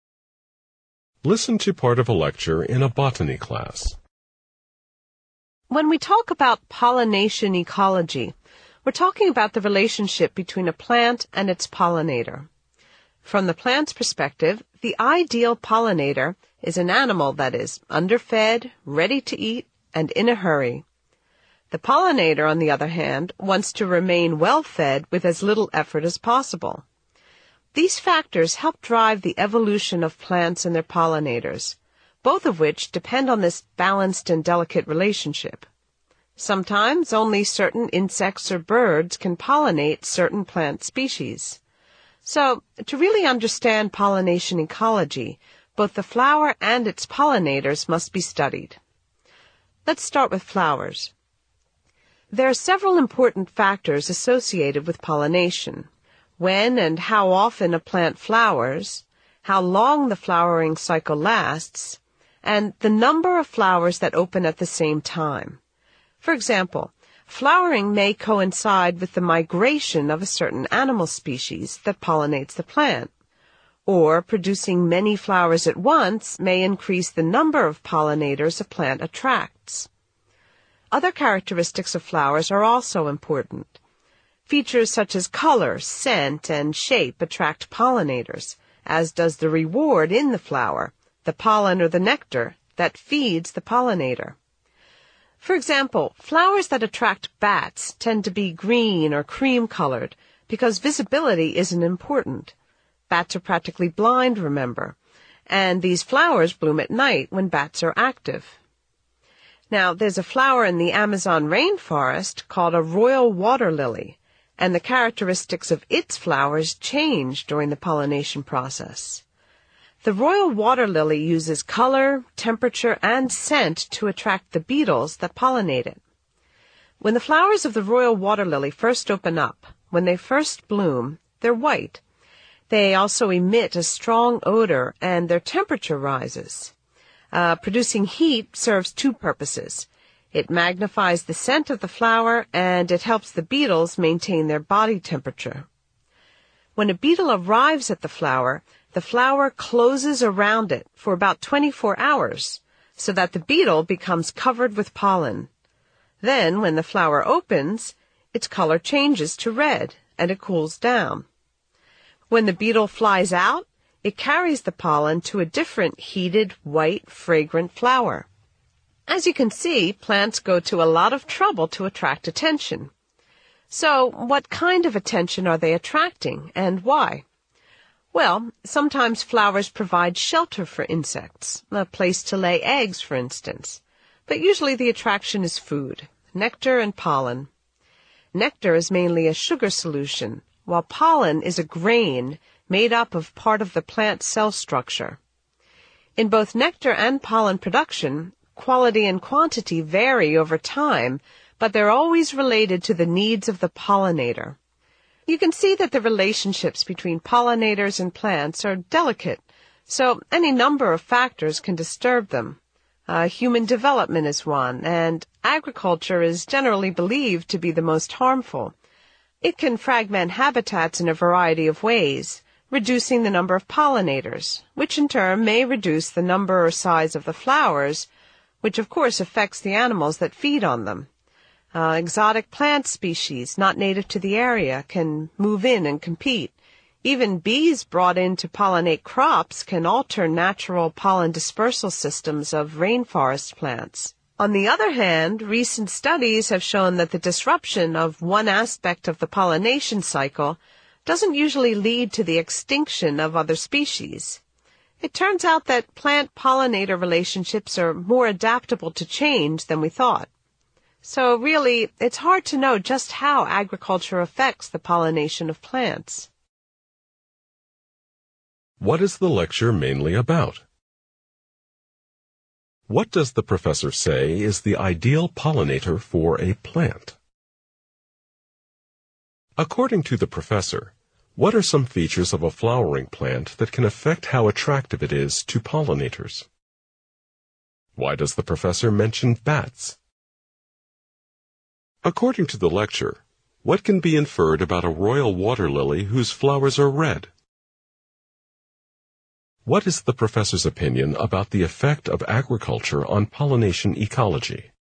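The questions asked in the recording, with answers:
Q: What is the lecture mainly about?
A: The relationship between plants and their pollinators (pollination ecology)

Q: What does the professor say is the ideal pollinator for a plant?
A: An animal that is underfed, ready to eat, and in a hurry

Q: According to the professor, what are some features of a flowering plant that can affect how attractive it is to pollinators?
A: Color, scent, shape, the reward (pollen or nectar), and flowering timing and number of flowers

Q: Why does the professor mention bats?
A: To show that flower color suits the pollinator: bat flowers are green or cream because bats barely see and the flowers bloom at night

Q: What is the professor's opinion about the effect of agriculture on pollination ecology?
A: It is hard to know how agriculture affects pollination; its harm may be less than generally believed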